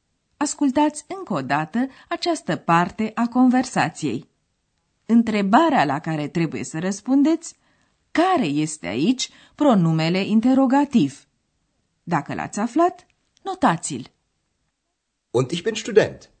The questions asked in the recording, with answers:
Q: Întrebarea la care trebuie să răspundeți care este aici pronumele interrogativ.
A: Căutam apoi pronumele interogativ was.